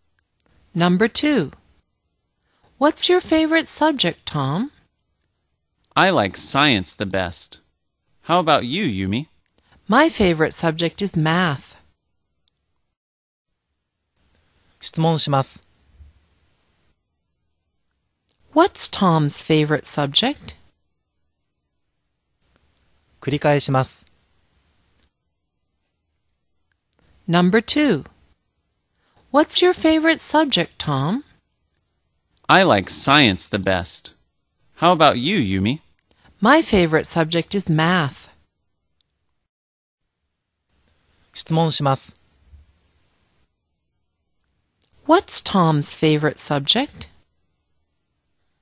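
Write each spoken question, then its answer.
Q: What's Tom's favorite subject?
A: Science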